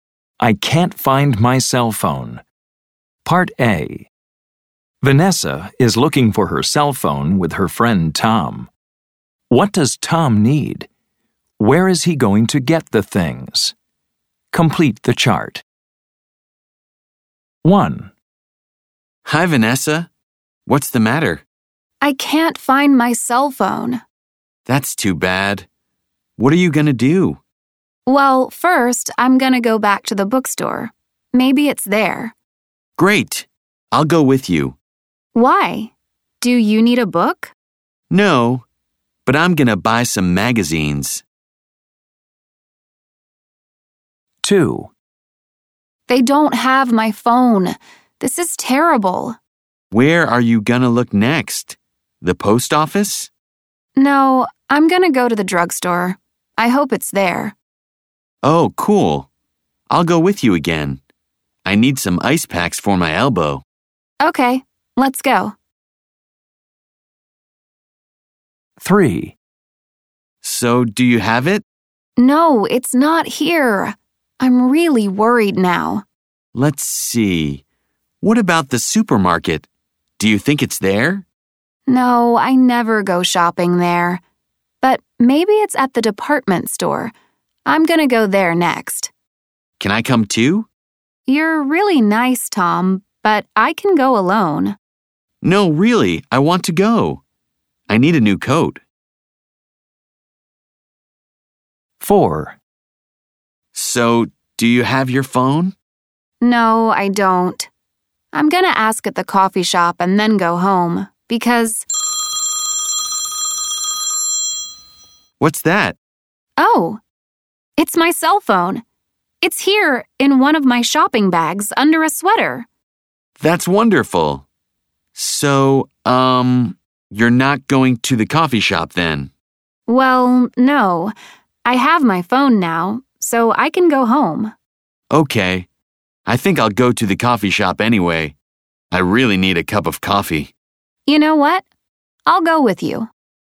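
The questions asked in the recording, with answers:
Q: What does Tom need?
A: Magazines, ice packs for his elbow, a new coat, and a cup of coffee

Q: Where is he going to get the things?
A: The bookstore, the drugstore, the department store, and the coffee shop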